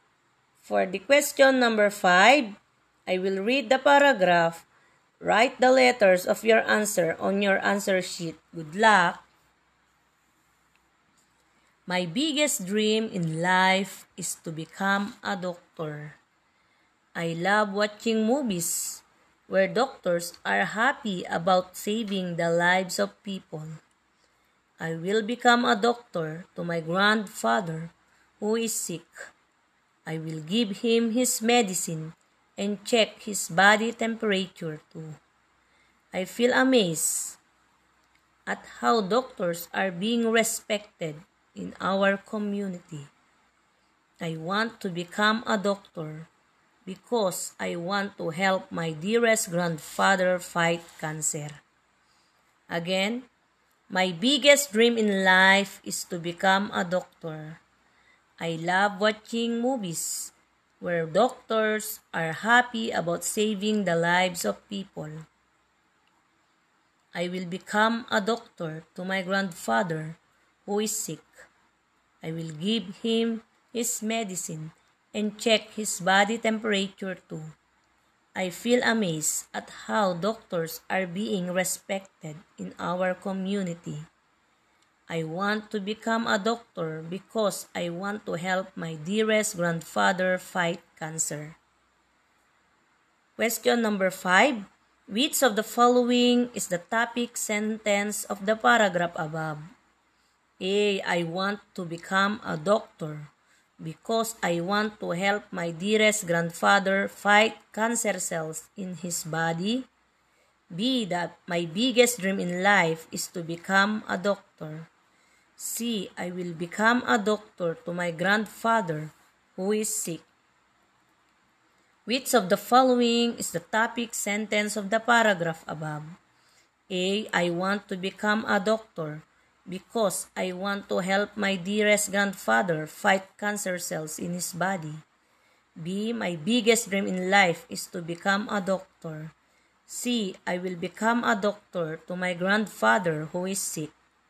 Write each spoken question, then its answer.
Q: Which of the following is the topic sentence of the paragraph above?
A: Yes, letter B. My biggest dream in life is to become a doctor.